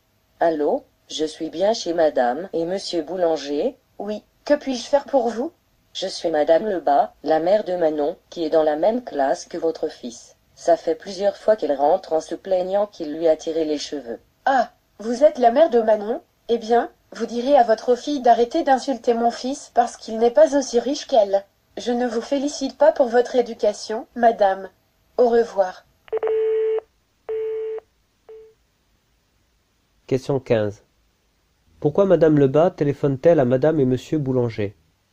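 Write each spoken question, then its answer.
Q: Pourquoi Madame Lebas téléphone-t-elle à Madame et Monsieur Boulanger?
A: Pour se plaindre que leur fils tire les cheveux de sa fille Manon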